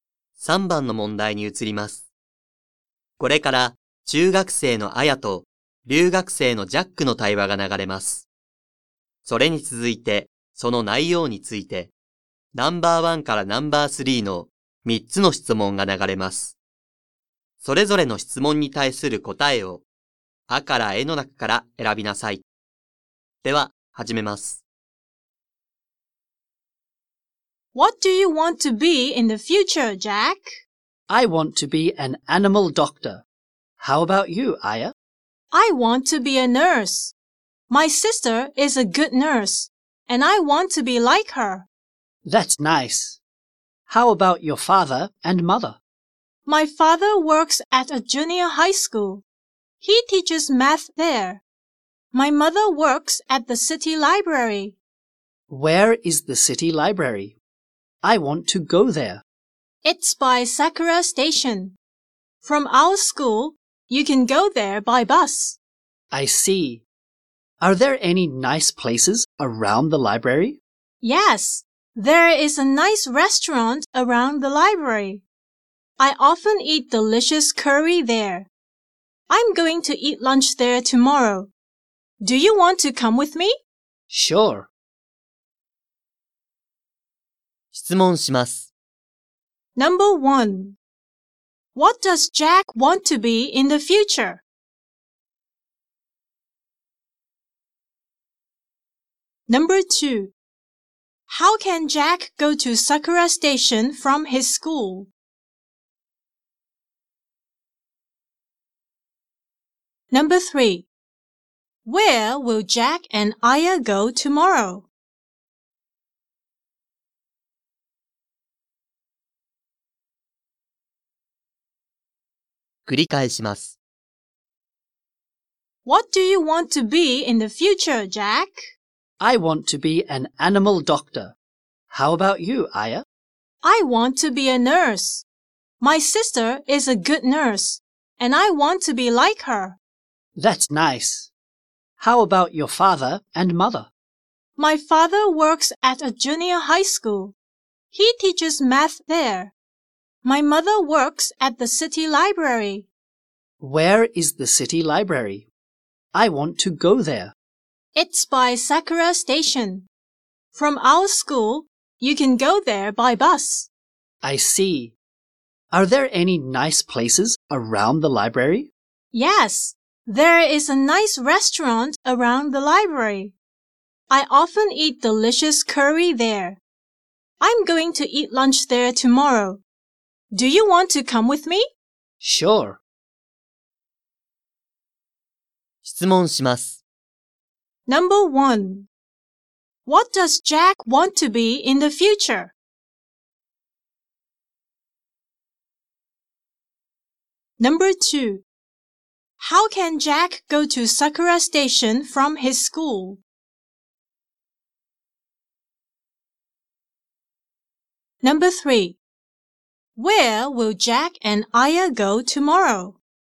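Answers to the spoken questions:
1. An animal doctor.
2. By bus.
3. To a restaurant near the library.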